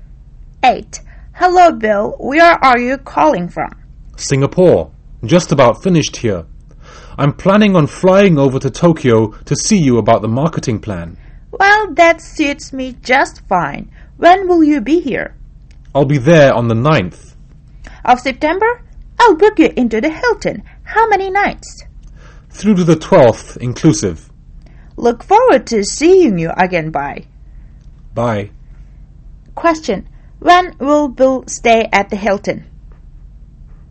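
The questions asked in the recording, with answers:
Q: When will Bill stay at the Hilton?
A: From 9th to 12th September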